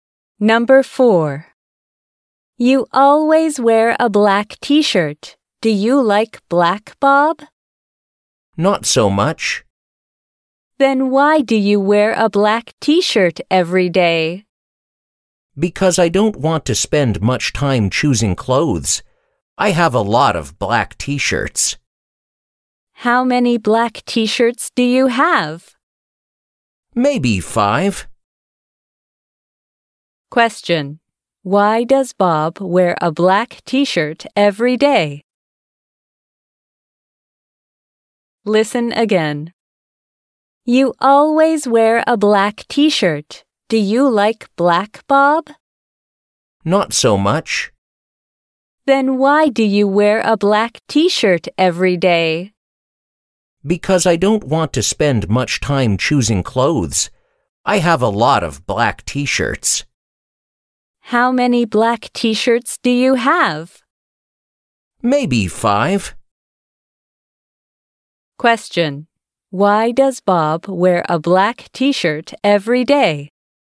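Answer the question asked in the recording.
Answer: Because he doesn't want to spend much time choosing clothes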